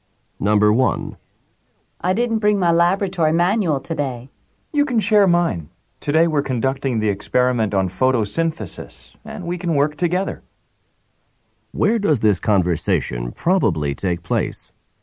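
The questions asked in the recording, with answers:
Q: Where does this conversation probably take place?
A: In a laboratory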